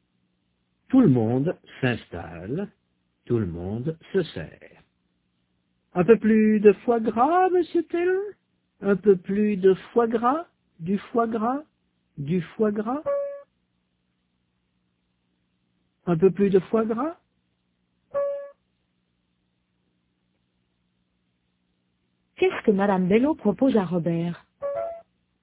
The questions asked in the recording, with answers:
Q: Qu'est-ce que madame Bello propose à Robert?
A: Un peu plus de foie gras.